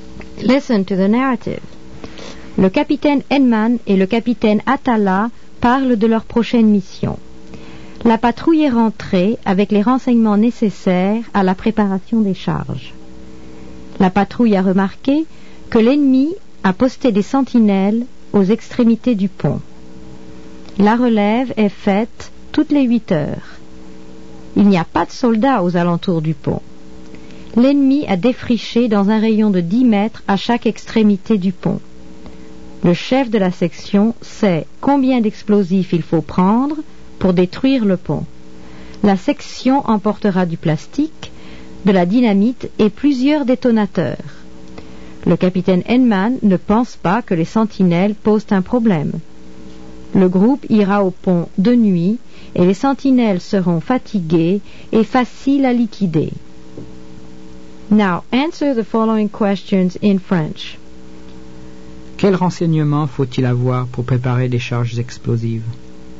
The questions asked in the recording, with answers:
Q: Quels renseignements faut-il avoir pour préparer des charges explosives?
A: Il faut avoir les dimensions de l'objectif à détruire.